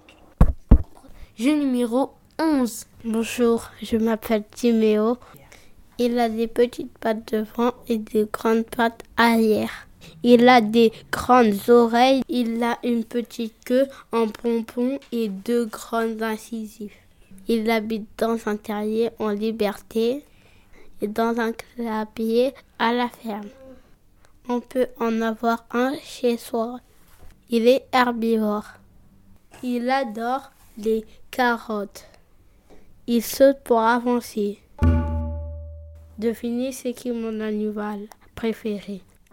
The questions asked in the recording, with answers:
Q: Devinez ce qui est mon animal préféré.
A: C'est le lapin.